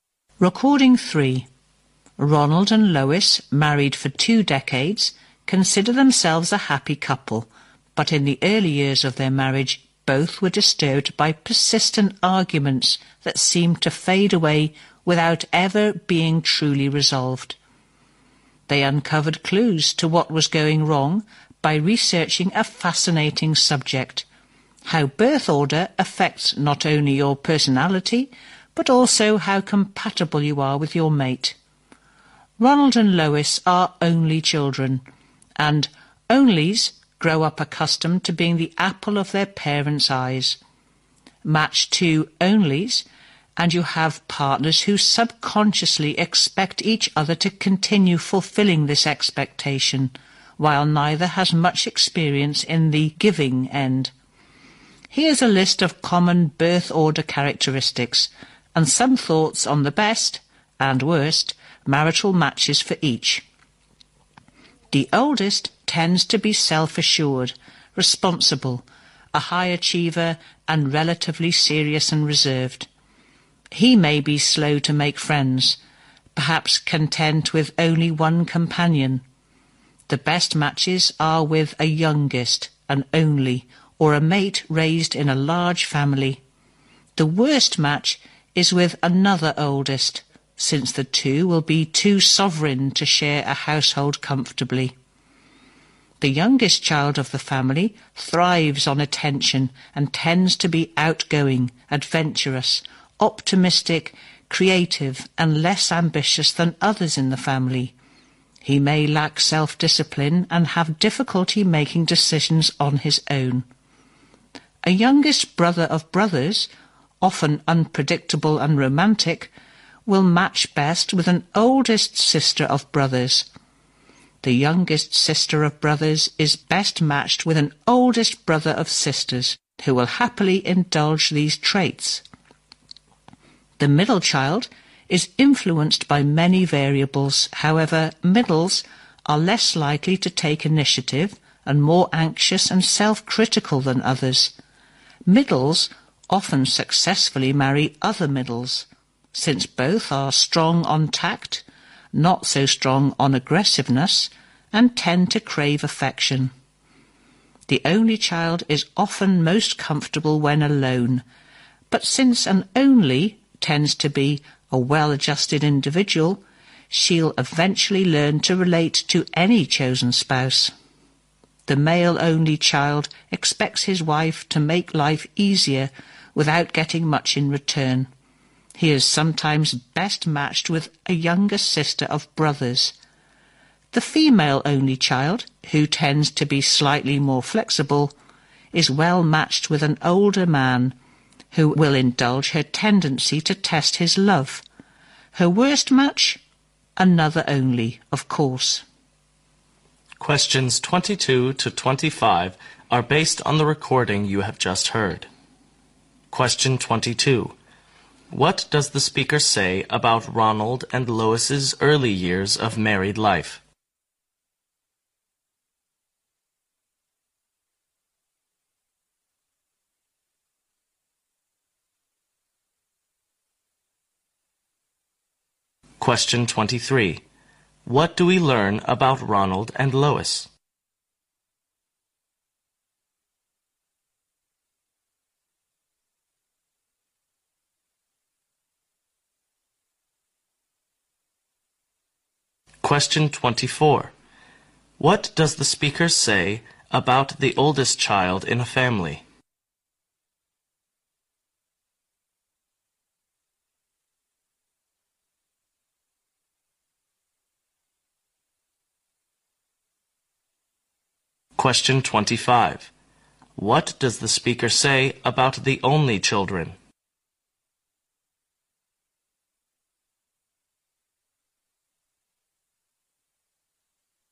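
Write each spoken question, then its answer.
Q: What does the speaker say about Ronald and Lois's early years of married life?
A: They were troubled by persistent arguments that were never truly resolved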